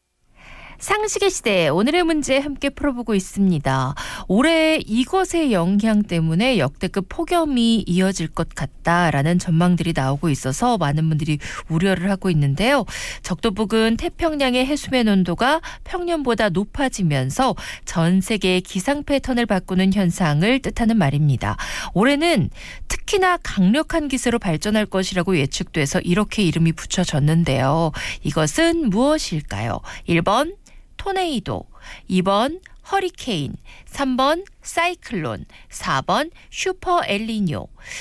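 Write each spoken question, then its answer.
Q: 이것은 무엇일까요?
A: 4: 슈퍼 엘니뇨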